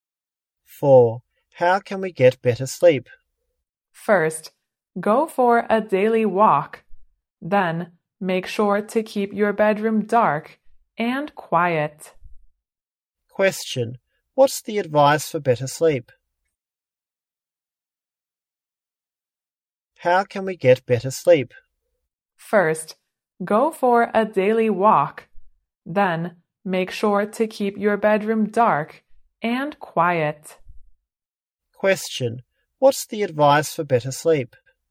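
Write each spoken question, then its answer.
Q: What's the advice for better sleep?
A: Take a daily walk and keep the bedroom dark and quiet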